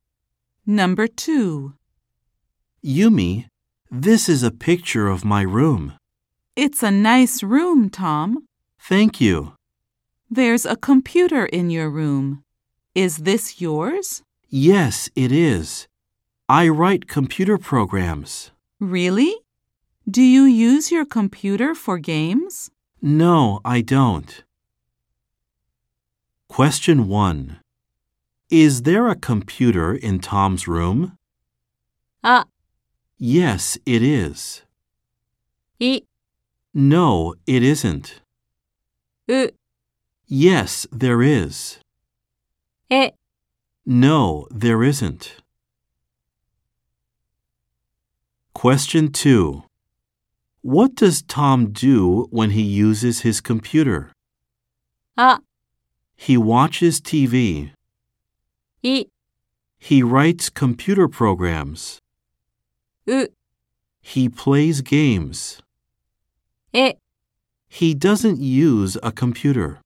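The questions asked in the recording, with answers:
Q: Is there a computer in Tom's room?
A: う: Yes, there is.

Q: What does Tom do when he uses his computer?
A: い: He writes computer programs.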